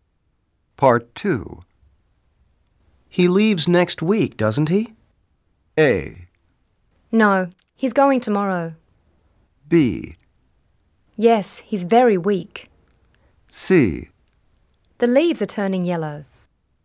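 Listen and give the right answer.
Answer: A: No, he's going tomorrow.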